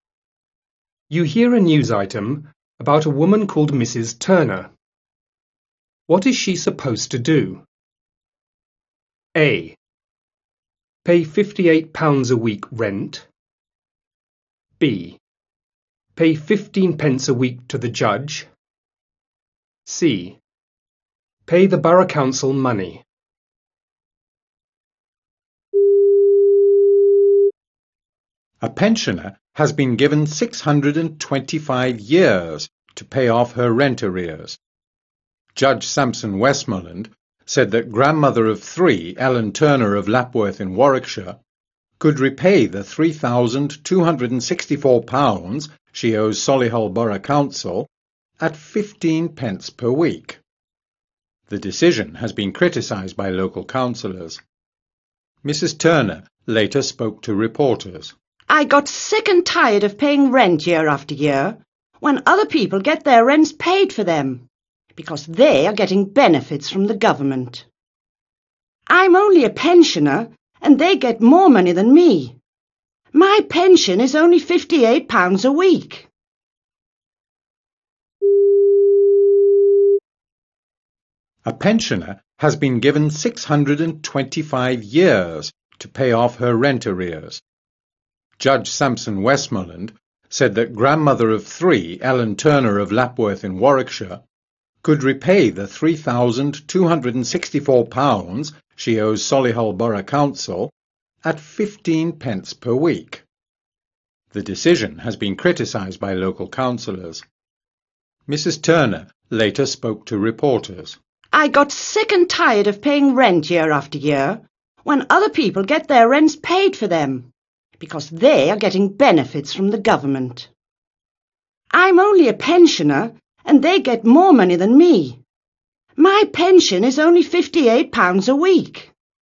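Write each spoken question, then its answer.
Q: What is she supposed to do?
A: C: Pay the borough council money.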